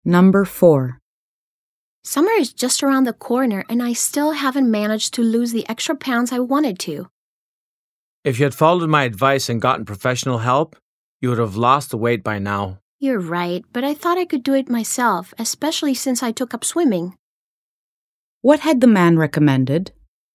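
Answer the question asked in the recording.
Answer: Getting professional help to lose weight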